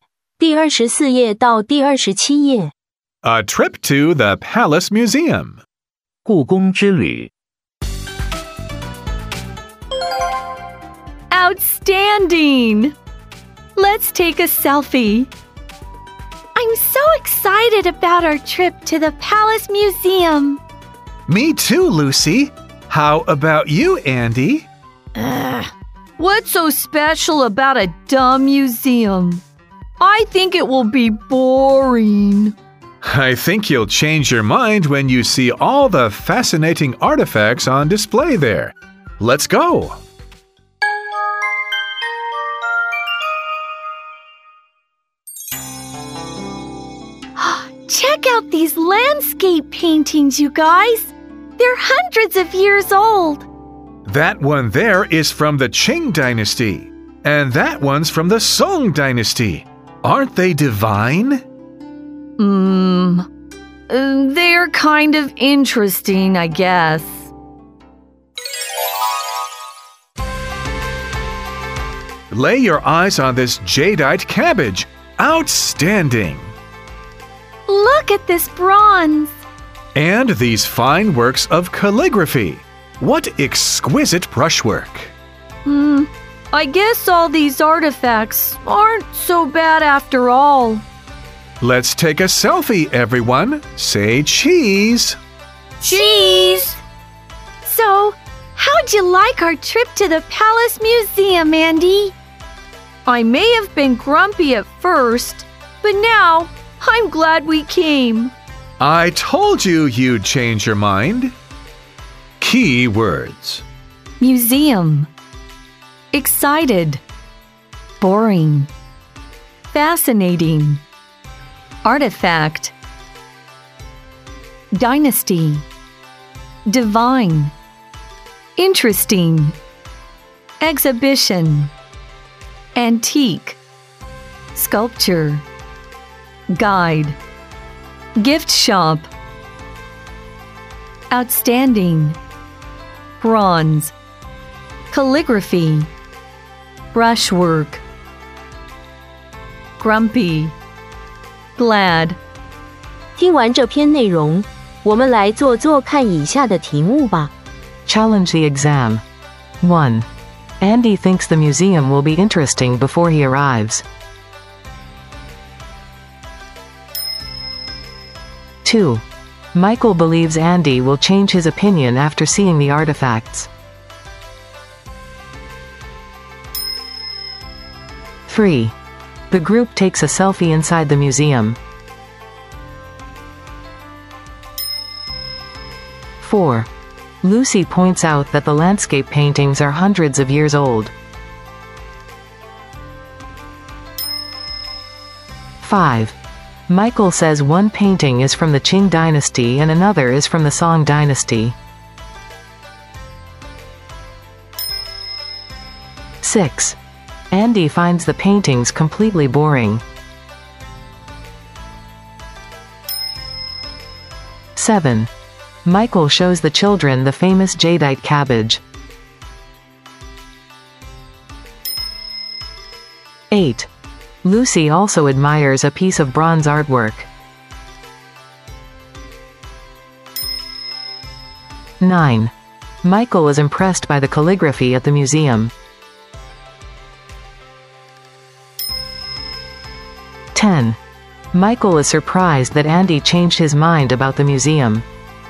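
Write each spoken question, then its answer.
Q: Andy thinks the museum will be interesting before he arrives.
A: False

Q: Andy finds the paintings completely boring.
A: False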